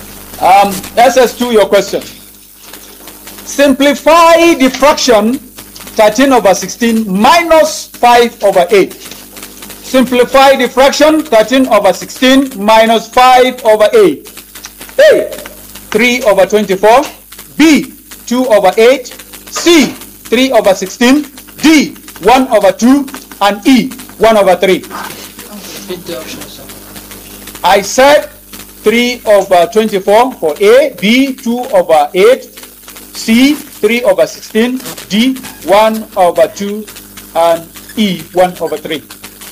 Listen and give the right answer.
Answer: 3 over 16!